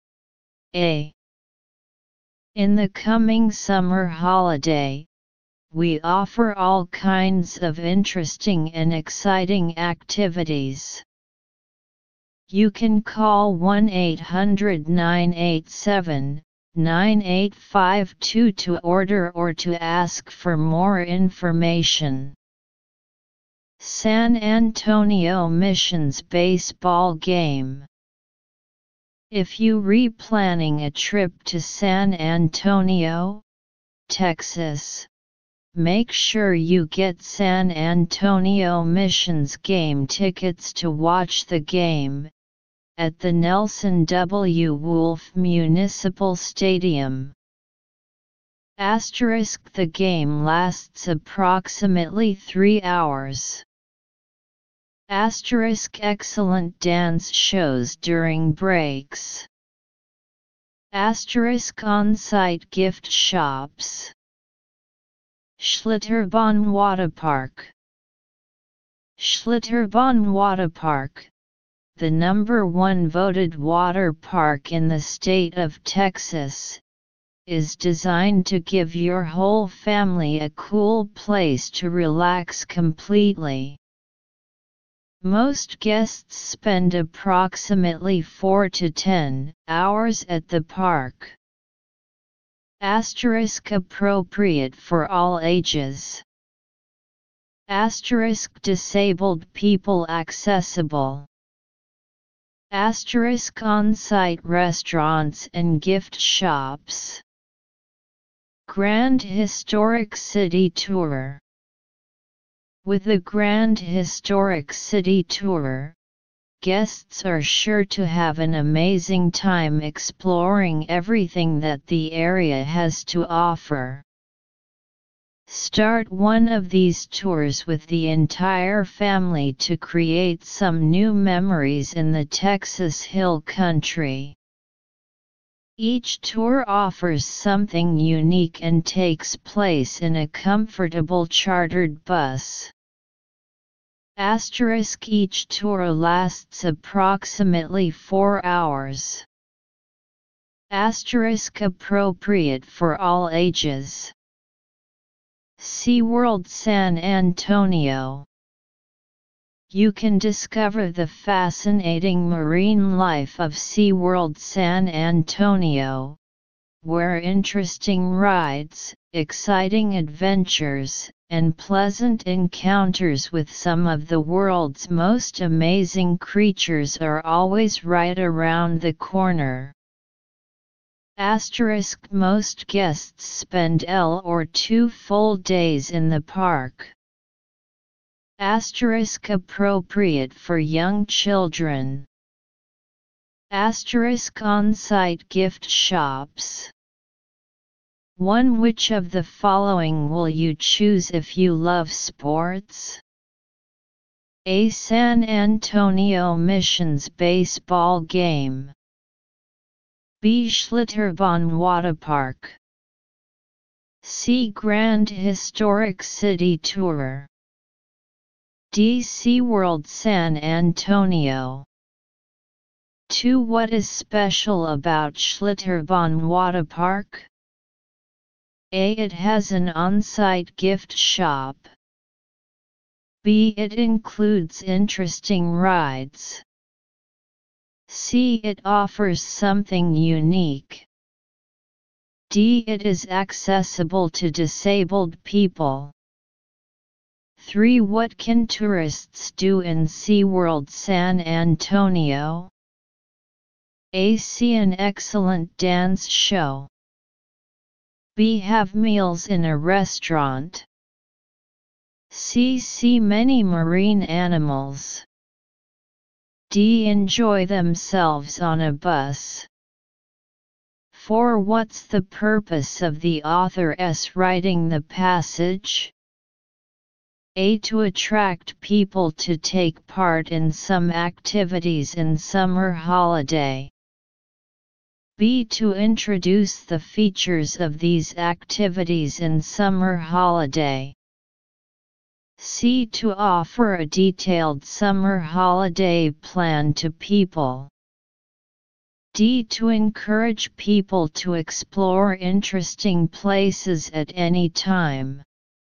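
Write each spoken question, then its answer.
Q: which of the following will you choose if you love sports?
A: A: San Antonio Missions Baseball Game.

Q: What is special about Schlitterbahn Waterpark?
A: D: It is accessible to disabled people.

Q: What can tourists do in SeaWorld San Antonio?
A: C: See many marine animals.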